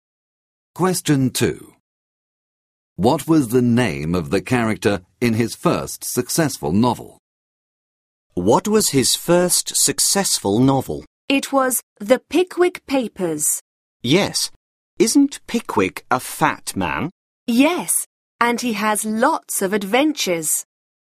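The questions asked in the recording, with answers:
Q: What was the name of the character in his first successful novel?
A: Pickwick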